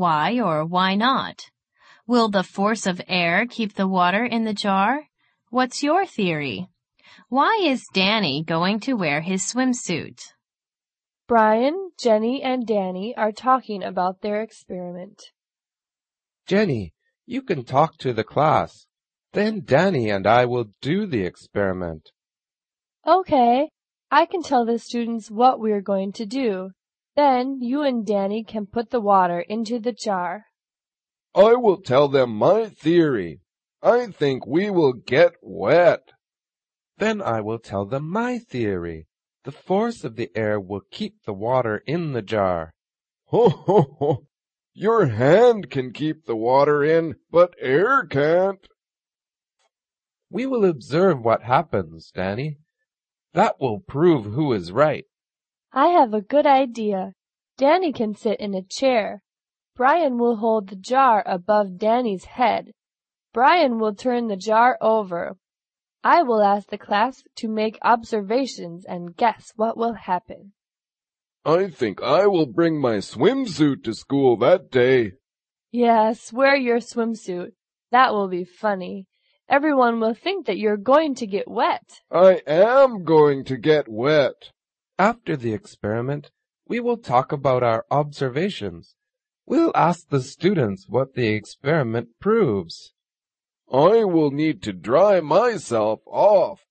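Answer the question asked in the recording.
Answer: Because he thinks he will get wet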